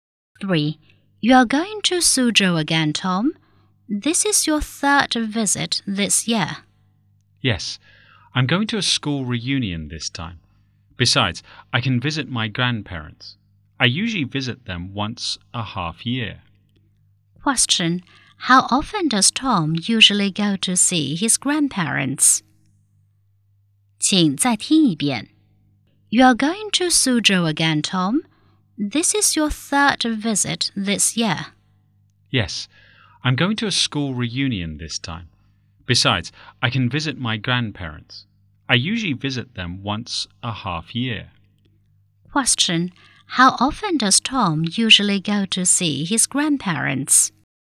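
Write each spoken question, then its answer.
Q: How often does Tom usually go to see his grandparents?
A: Once every half year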